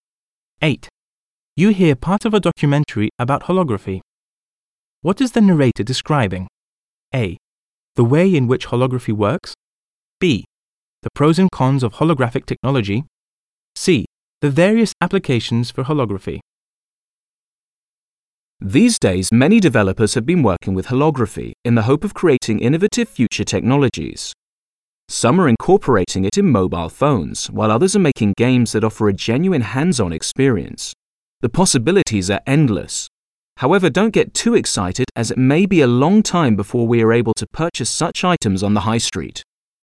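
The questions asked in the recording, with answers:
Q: What is the narrator describing?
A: C: The various applications for holography.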